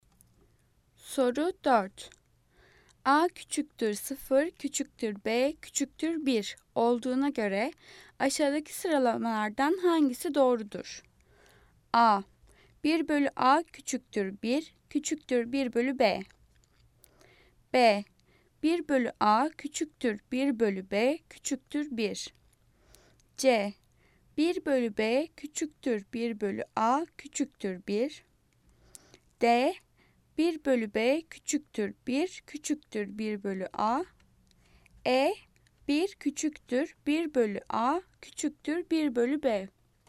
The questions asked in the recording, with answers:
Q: A küçüktür 0, küçüktür B, küçüktür 1 olduğuna göre aşağıdaki sıralamalardan hangisi doğrudur?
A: Cevap A. 1 bölü A küçüktür 1, küçüktür 1 bölü B.